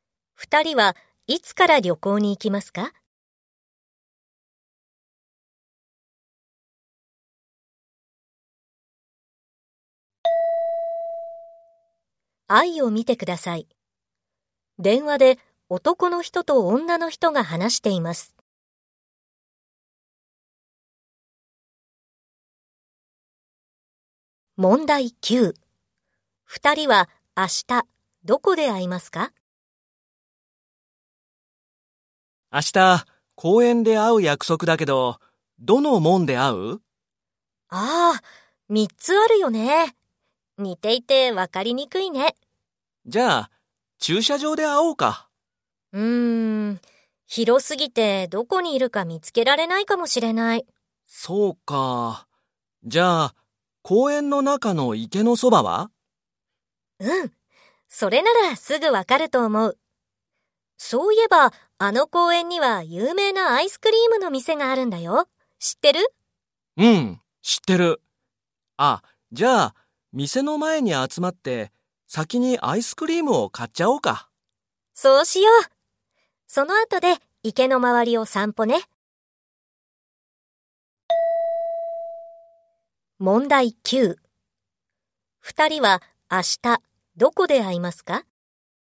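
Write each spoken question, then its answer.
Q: 二人は明日どこで会いますか?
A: 公園のアイスクリームの店の前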